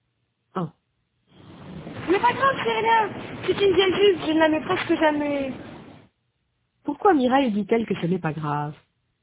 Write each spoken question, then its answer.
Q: Pourquoi Mireille dit-elle que ce n'est pas grave?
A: Parce que c'est une vieille jupe.